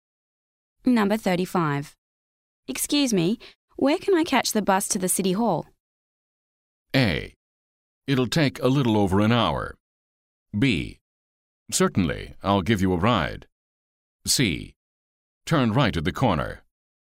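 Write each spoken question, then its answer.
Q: Excuse me, where can I catch the bus to the City Hall?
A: C: Turn right at the corner.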